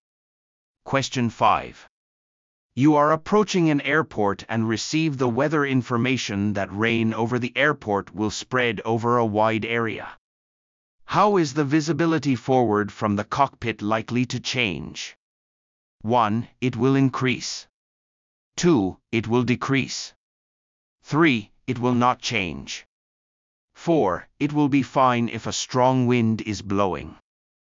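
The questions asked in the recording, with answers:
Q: How is the visibility forward from the cockpit likely to change?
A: 2: It will decrease.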